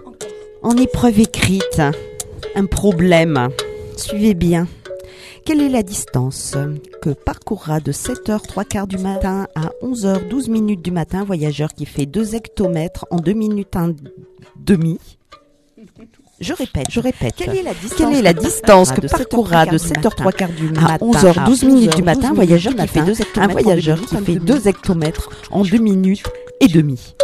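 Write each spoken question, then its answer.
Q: Quelle est la distance que parcourra de 7h15 du matin à 11h12 du matin un voyageur qui fait 2 hectomètres en 2 minutes et demi?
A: 18 960 mètres (18,96 km)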